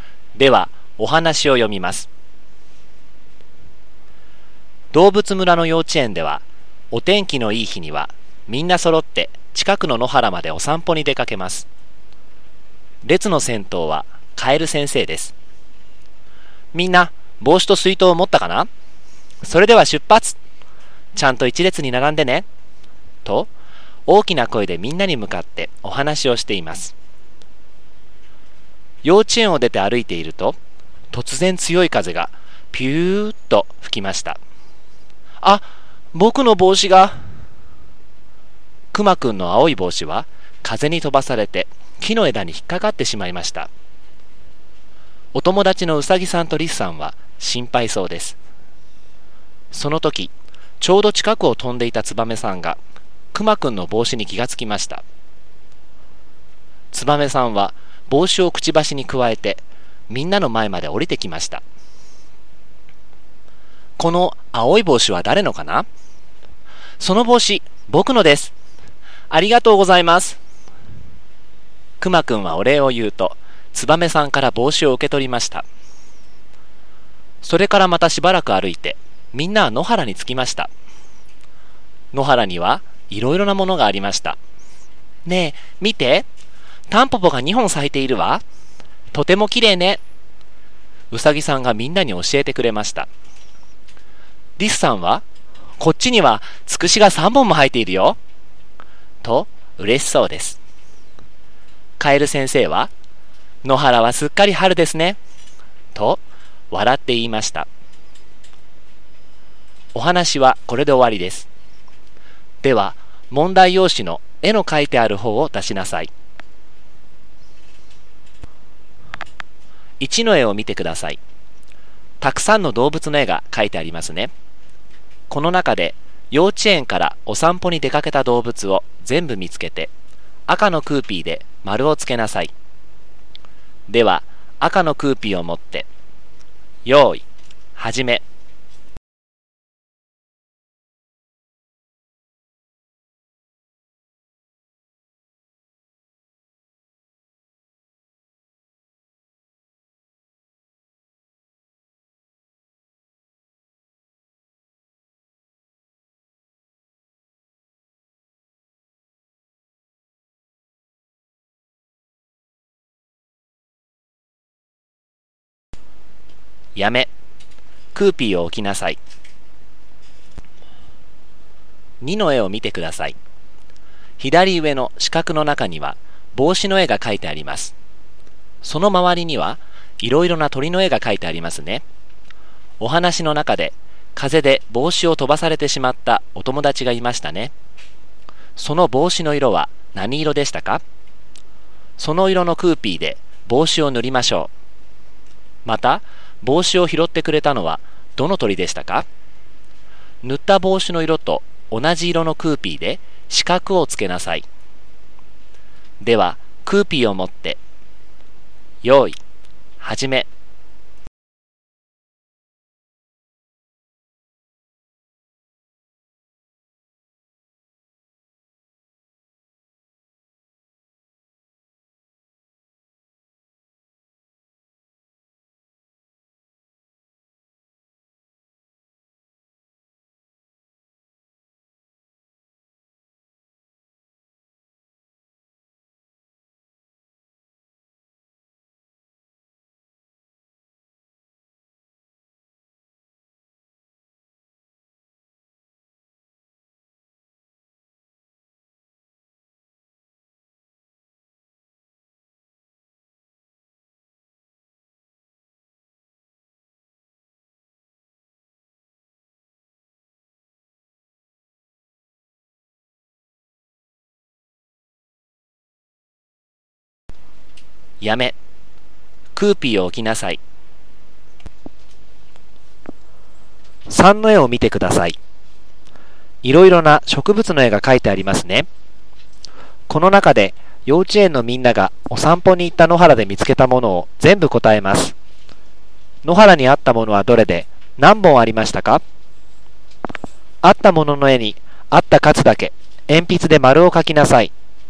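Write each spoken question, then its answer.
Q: また帽子を拾ってくれたのはどの鳥でしたか?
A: ツバメ

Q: 野原にあったものはどれで何本ありましたか?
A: タンポポ2本とつくし3本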